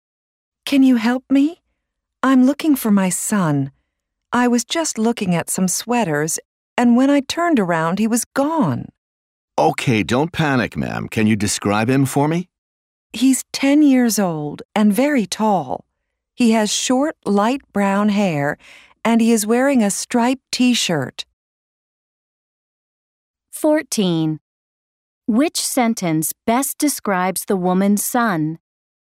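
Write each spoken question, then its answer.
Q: Which sentence best describes the woman's son?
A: He is 10, very tall, with short light brown hair and a striped T-shirt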